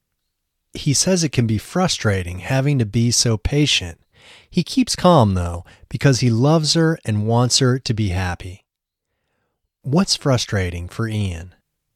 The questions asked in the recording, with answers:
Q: What's frustrating for Ian?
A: Having to be so patient is frustrating for Ian.